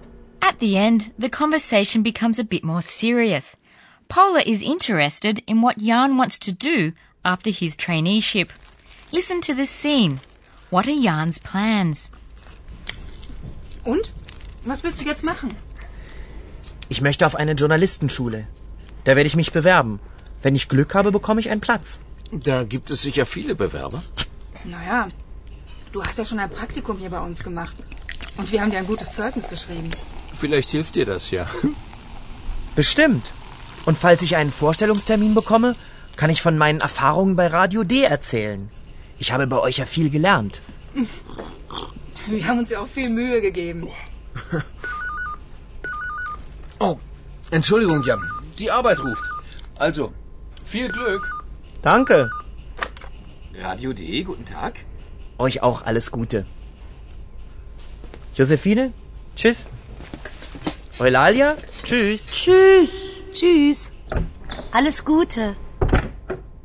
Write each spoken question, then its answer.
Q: What are Jan's plans?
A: Jan wants to go to a school for journalists.